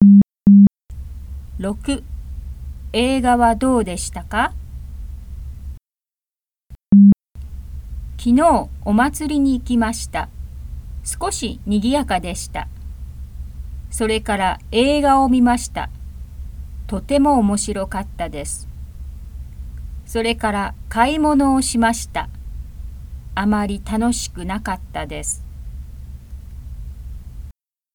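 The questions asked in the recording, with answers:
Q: 映画はどうでしたか?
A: とても面白かった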